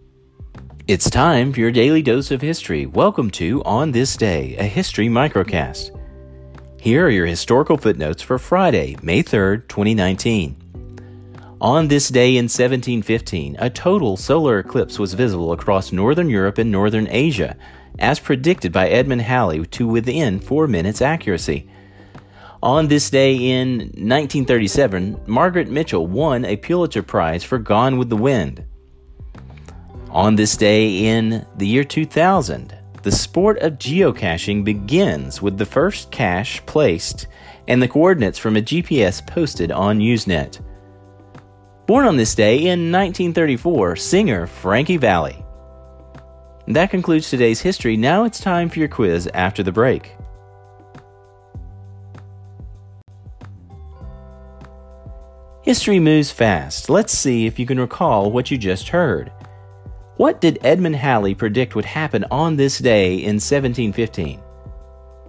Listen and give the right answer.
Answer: a total solar eclipse across northern Europe and northern Asia.